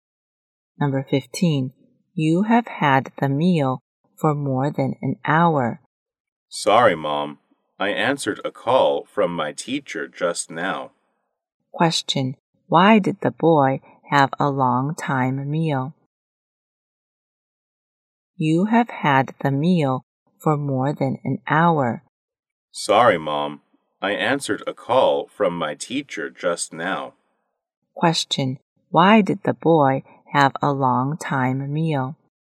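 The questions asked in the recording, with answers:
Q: Why did the boy have a long time meal?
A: He answered a call from his teacher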